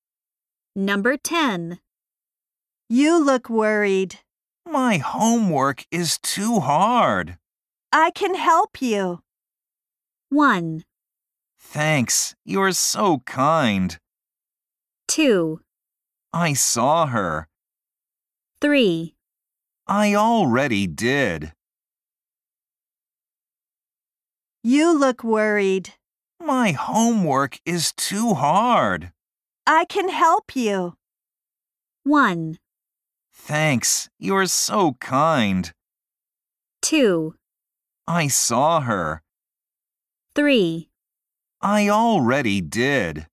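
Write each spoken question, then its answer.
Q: I can help you.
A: 1: Thanks, you're so kind.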